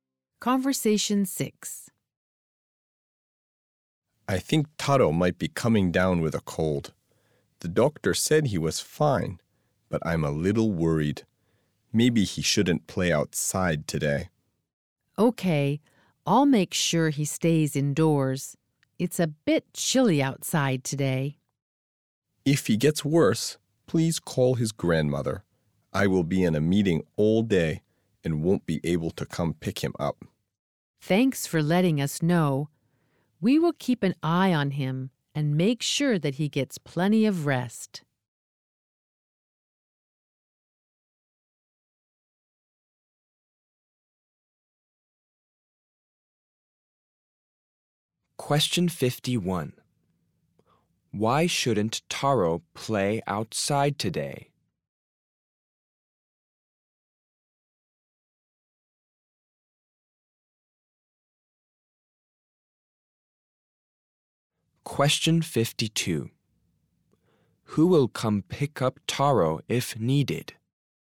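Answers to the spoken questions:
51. He might be coming down with a cold
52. His grandmother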